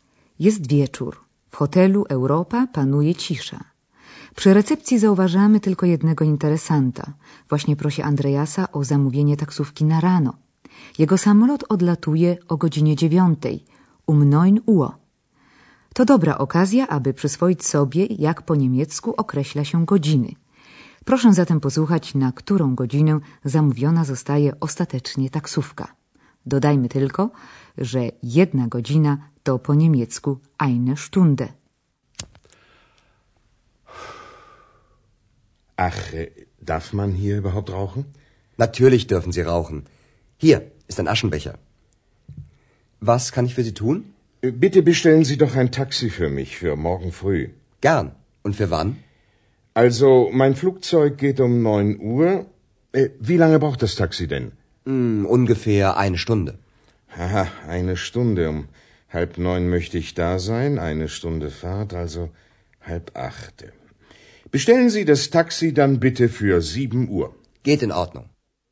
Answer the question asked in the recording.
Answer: Gość zdecydował zatem, że taksówka powinna przyjechać o godzinie siódmej rano.